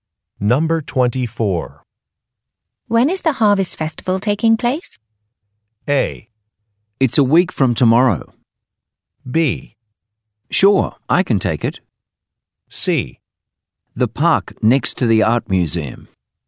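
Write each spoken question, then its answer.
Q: When is the Harvest Festival taking place?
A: A: It's a week from tomorrow.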